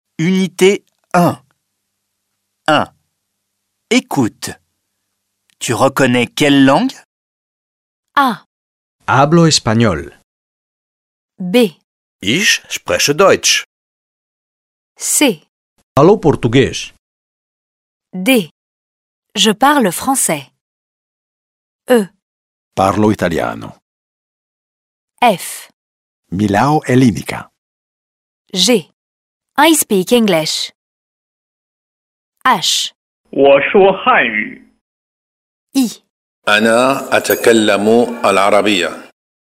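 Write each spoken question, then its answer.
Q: Tu reconnais quelle langue?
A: l'espagnol

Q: Tu reconnais quelle langue?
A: l'allemand

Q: Tu reconnais quelle langue?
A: le portugais

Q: Tu reconnais quelle langue?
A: le français

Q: Tu reconnais quelle langue?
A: l'italien

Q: Tu reconnais quelle langue?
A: le grec

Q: Tu reconnais quelle langue?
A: l'anglais

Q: Tu reconnais quelle langue?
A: le chinois

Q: Tu reconnais quelle langue?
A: l'arabe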